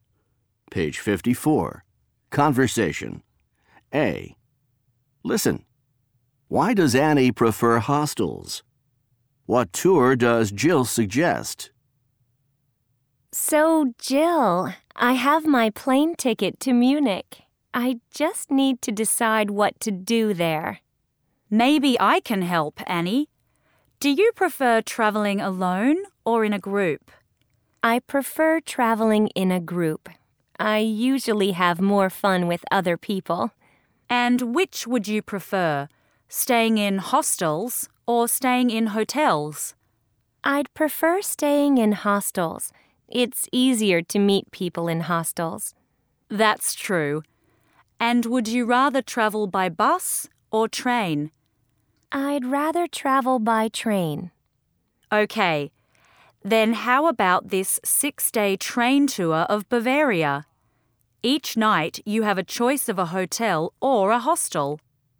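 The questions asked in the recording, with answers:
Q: Why does Annie prefer hostels?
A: It's easier to meet people in hostels.

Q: What tour does Jill suggest?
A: A 6-day train tour of Bavaria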